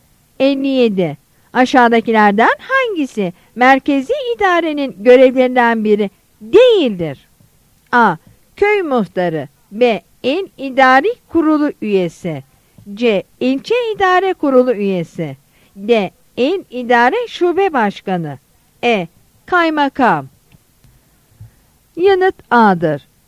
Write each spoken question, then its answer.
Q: Aşağıdakilerden hangisi merkezi idarenin görevlerinden biri değildir?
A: Yanıt A'dır.